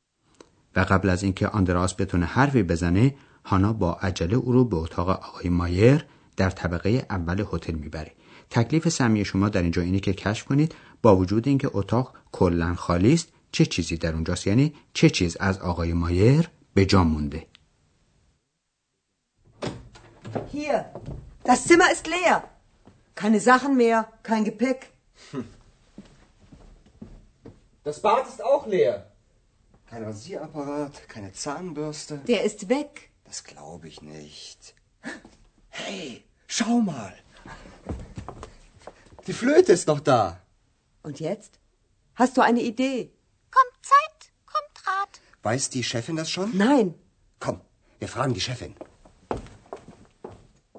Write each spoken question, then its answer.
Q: تکلیف سمی شما در اینجا اینه که کشف کنید با وجود اینکه اتاق کلا خالی است چه چیزی در اونجاست یعنی چه چیز از آقای مایر به جا مونده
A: بله تنها چیزی که در اتاق خالی از آقای مایر به مونده فلوت اوست